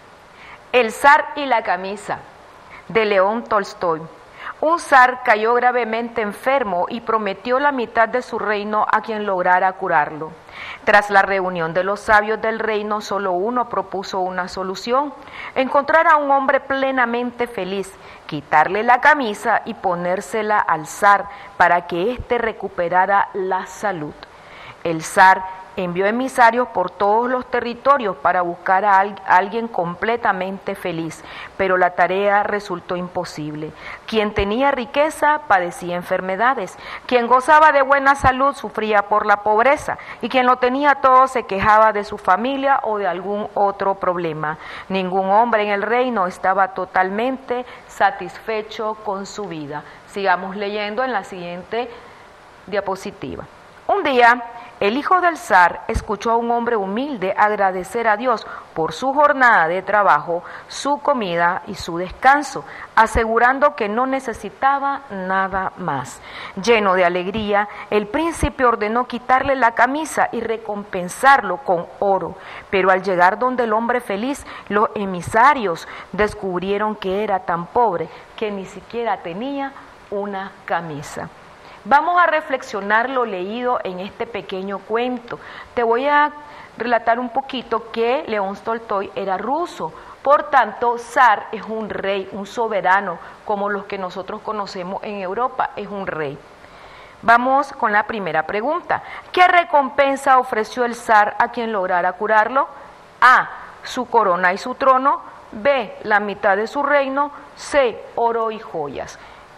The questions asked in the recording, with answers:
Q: ¿Qué recompensa ofreció el zar a quien lograra curarlo?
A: La respuesta correcta es el inciso B, la mitad de su reino.